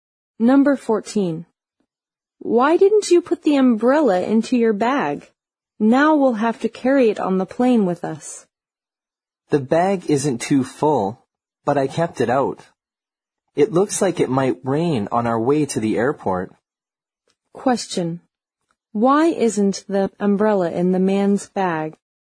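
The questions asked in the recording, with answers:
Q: Why isn't the umbrella in the man's bag?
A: It might rain on the way to the airport.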